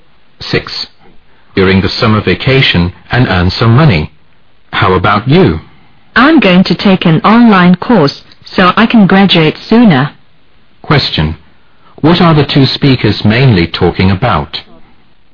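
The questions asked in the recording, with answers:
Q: What are the two speakers mainly talking about?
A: Their plans for the summer vacation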